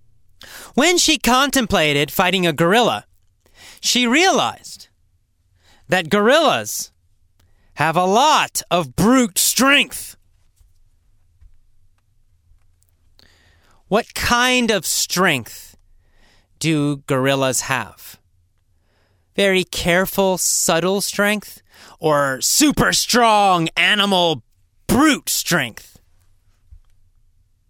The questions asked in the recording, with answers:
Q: What kind of strength do gorillas have?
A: Well, they have brute strength.